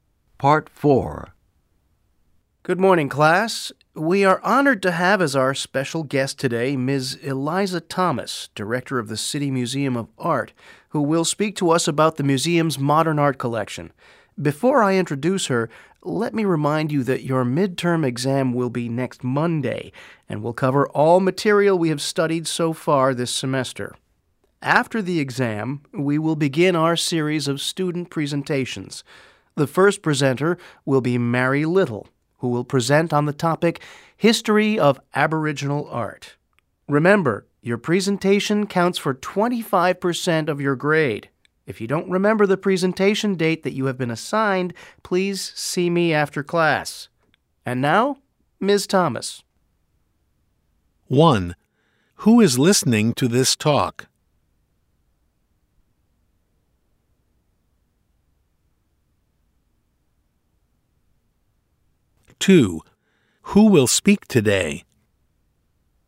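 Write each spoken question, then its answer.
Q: Who is listening to this talk?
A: Students in a class

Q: Who will speak today?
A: Ms. Eliza Thomas, director of the City Museum of Art

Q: Who is Mary Little?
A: A student who will give the first presentation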